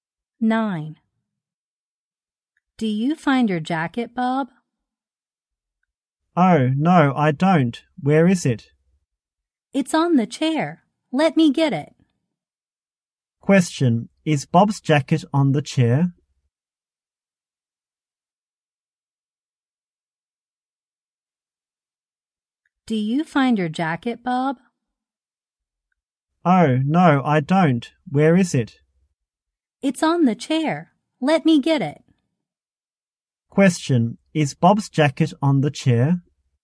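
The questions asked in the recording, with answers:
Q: Is Bob's jacket on the chair?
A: Yes, it is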